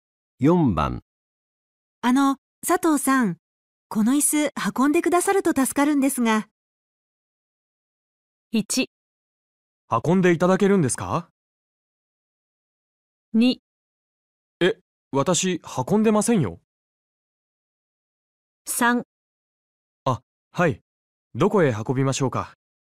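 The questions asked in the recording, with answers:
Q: あの、佐藤さん、この椅子運んでくださると助かるんですが。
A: 3: あ、はい。どこへ運びましょうか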